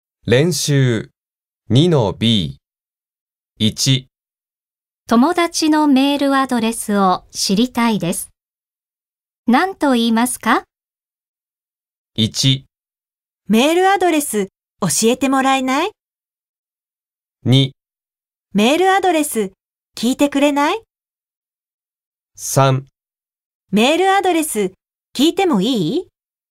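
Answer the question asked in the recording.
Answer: 1: メールアドレス教えてもらえない?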